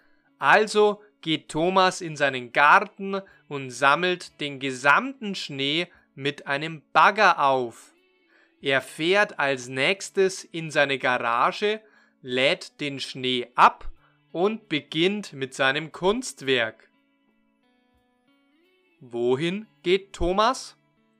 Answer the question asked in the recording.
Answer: In seinen Garten.